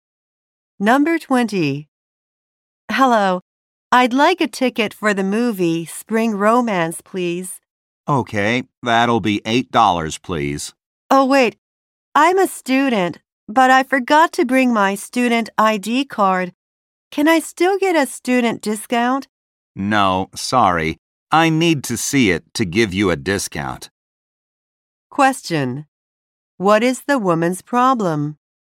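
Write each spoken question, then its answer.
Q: What is the woman's problem?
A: She forgot her student ID card.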